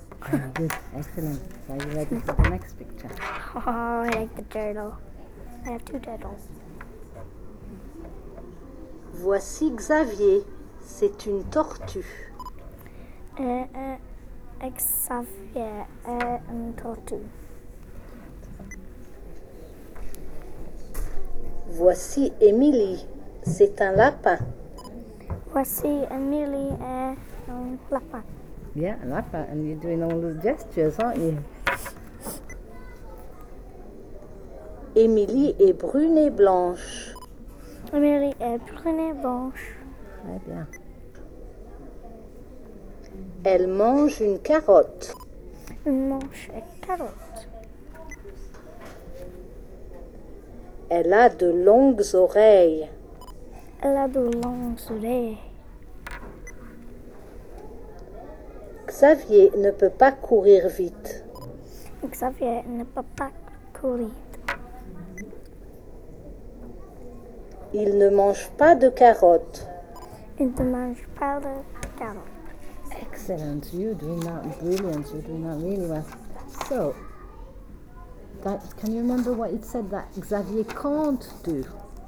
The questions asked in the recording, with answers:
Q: So, can you remember what it said that Xavier can't do?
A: Can't run very fast.